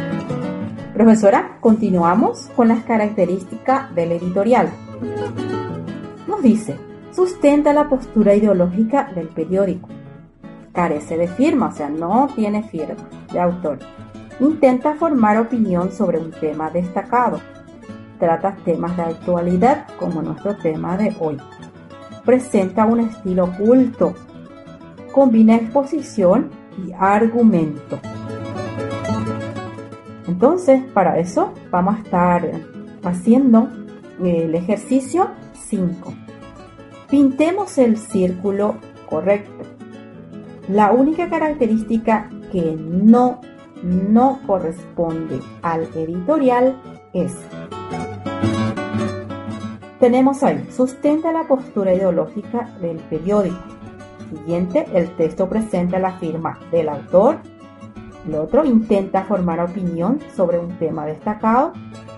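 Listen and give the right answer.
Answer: el texto presenta la firma del autor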